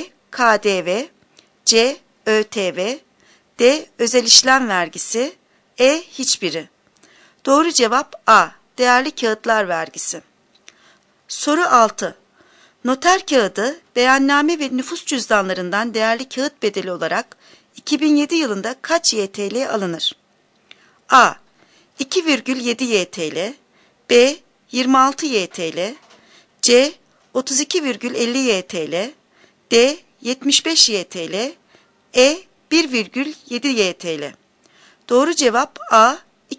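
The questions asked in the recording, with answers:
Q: Noter kağıdı, beyanname ve nüfus cüzdanlarından değerli kağıt bedeli olarak 2007 yılında kaç YTL alınır?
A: A: 2,7 YTL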